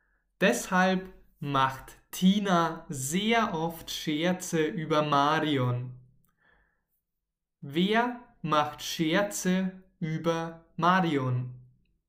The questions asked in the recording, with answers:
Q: Wer macht Scherze über Marion?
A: Tina. Tina macht sehr oft Scherze über Marion.